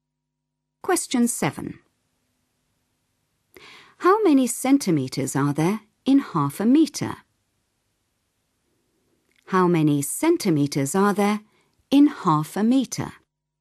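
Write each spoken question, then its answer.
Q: How many centimetres are there in 0.5 metre?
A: 50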